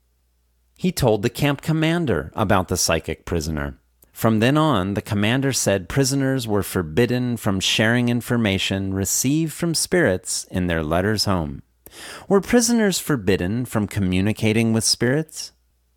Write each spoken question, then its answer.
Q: Were prisoners forbidden from communicating with spirits?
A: No. Prisoners weren't forbidden from communicating with spirits.